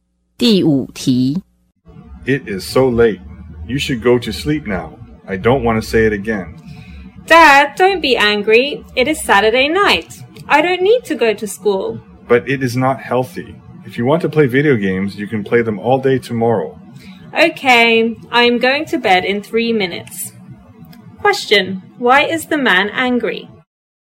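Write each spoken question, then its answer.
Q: why is the man angry?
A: His child is staying up too late instead of going to sleep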